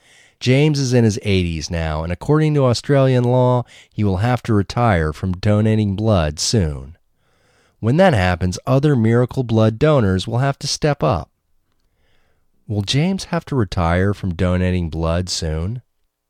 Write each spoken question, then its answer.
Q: Will James have to retire from donating blood soon?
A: Yes, James will have to retire from donating blood soon.